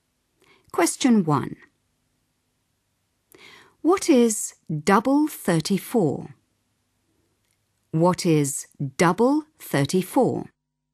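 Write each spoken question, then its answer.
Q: What is double 34?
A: 68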